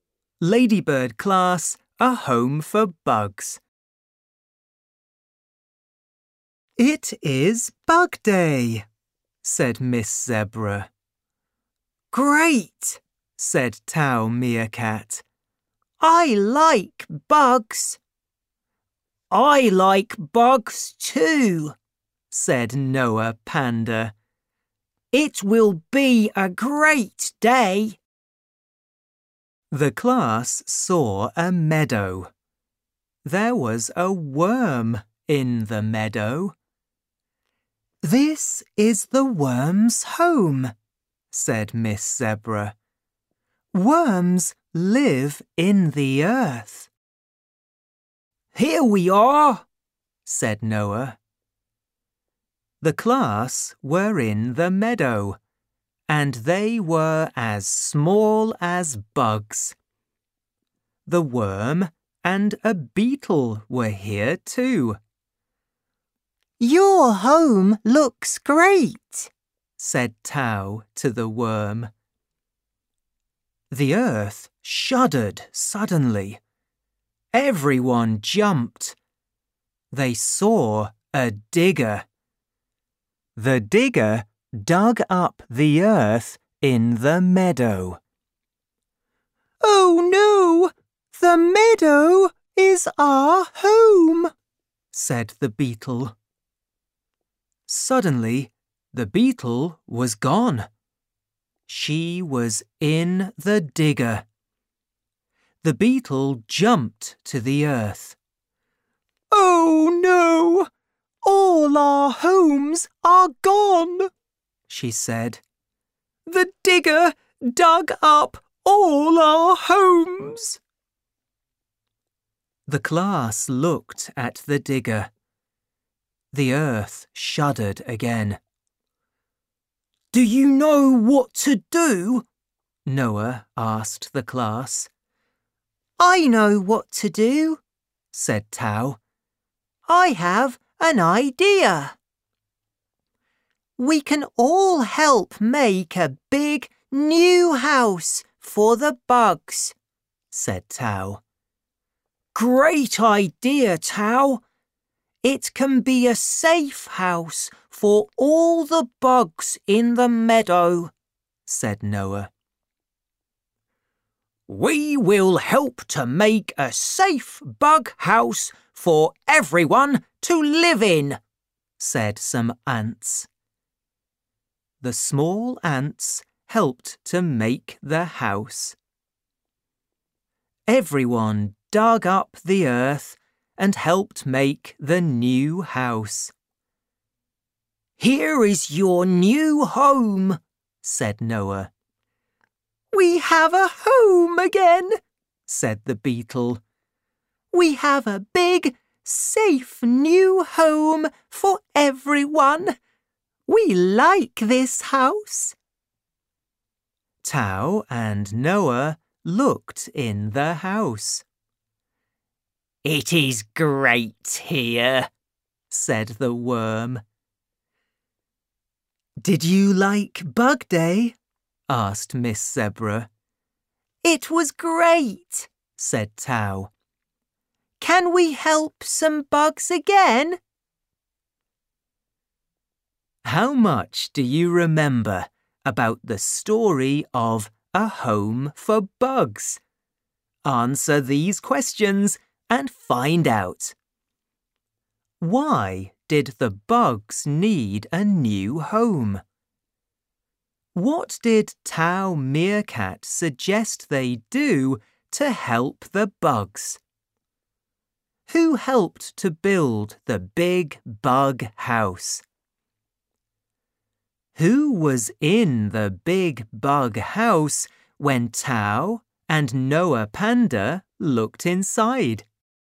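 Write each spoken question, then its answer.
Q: Why did the bugs need a new home?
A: A digger dug up the meadow and all their homes were gone.

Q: What did Tau Meerkat suggest they do to help the bugs?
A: Help make a big new house for the bugs.

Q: Who helped to build the big bug house?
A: Everyone, including the small ants.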